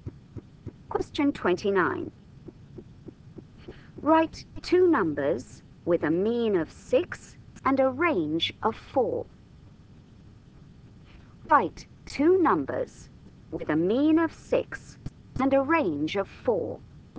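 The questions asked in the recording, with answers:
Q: Write two numbers with a mean of 6 and a range of 4.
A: 4 and 8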